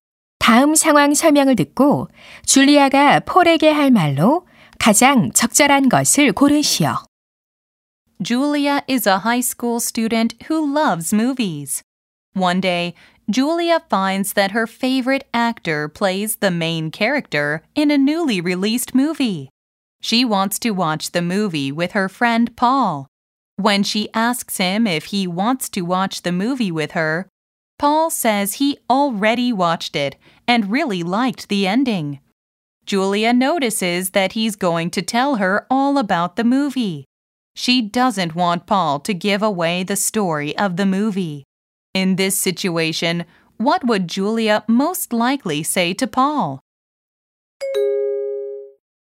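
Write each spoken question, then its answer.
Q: In this situation, what would Julia most likely say to Paul?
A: Please don't tell me the story or the ending of the movie.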